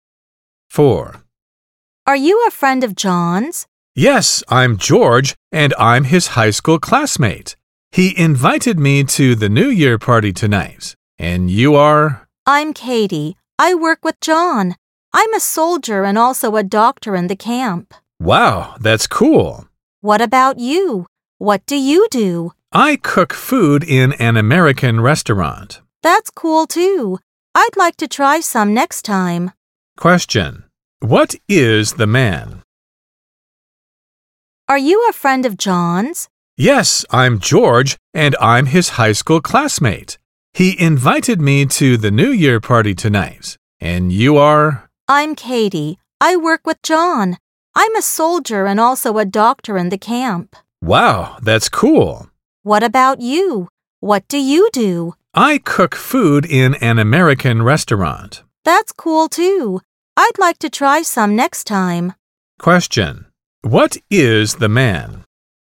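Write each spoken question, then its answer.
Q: What is the man?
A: A cook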